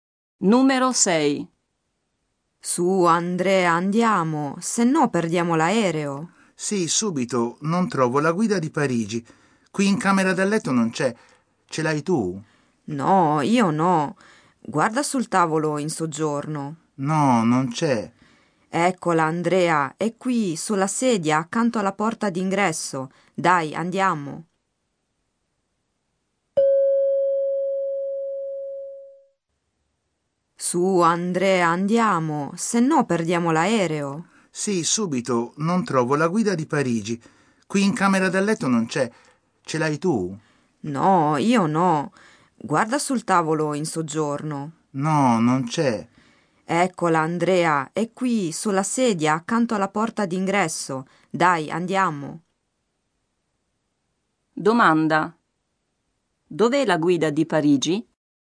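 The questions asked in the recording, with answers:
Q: Dov'è la guida di Parigi?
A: Sulla sedia, accanto alla porta d'ingresso.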